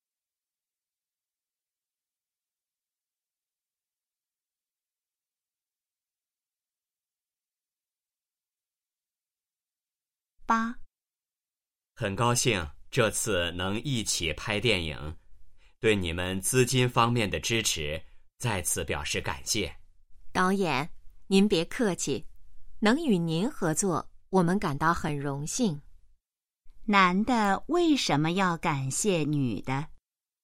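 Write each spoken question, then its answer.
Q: 男的为什么要感谢女的?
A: 女的在资金方面给予支持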